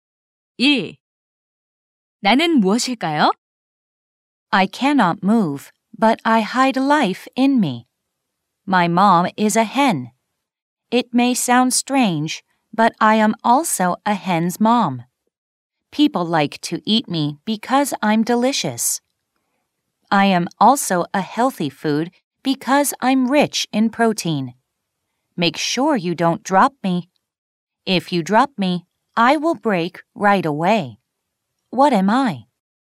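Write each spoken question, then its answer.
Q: What am I?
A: an egg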